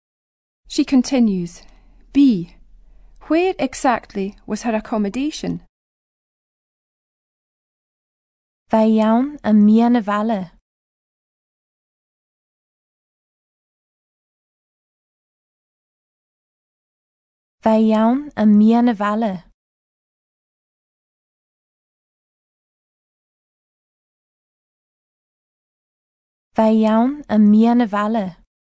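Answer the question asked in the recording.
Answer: In the middle of the town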